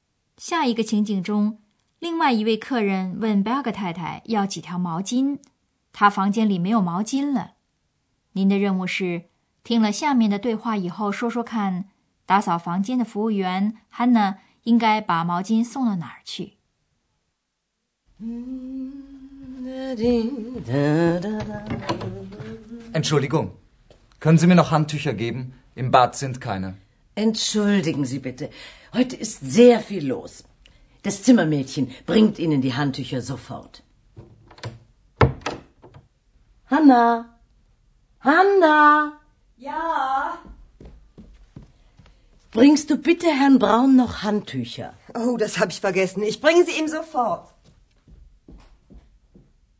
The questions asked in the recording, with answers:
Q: 您的任务是,听了下面的对话以后说说看,打扫房间的服务员 Hanna 应该把毛巾送到哪儿去。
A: Hanna 要把毛巾送到 Braun 先生的房间里去。